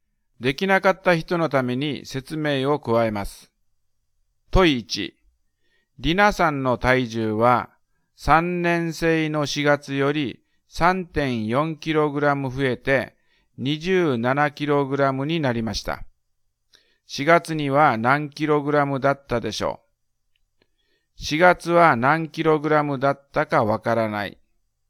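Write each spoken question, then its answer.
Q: 4月には何 kg だったでしょう。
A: 23.6kg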